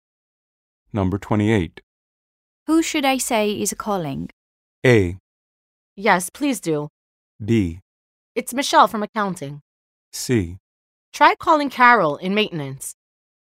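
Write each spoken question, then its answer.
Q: Who should I say is calling?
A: B: It's Michelle from accounting.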